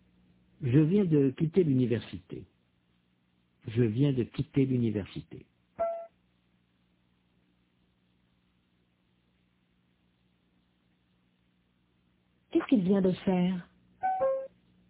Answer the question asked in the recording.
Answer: Il vient de quitter l'université.